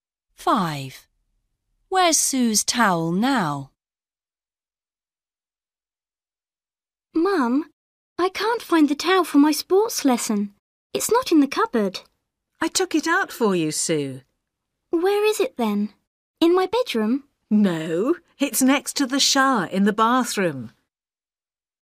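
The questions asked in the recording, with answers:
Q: Where's Sue's towel now?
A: Next to the shower in the bathroom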